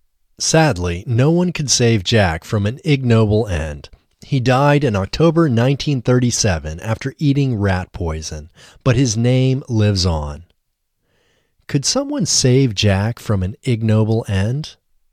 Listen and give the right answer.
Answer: No, no one could save Jack from an ignoble end.